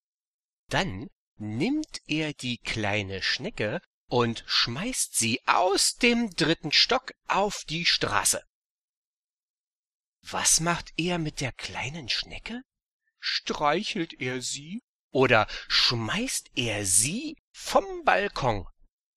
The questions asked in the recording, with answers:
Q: Streichelt er sie oder schmeißt er sie vom Balkon?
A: Der schmeißt sie vom Balkon.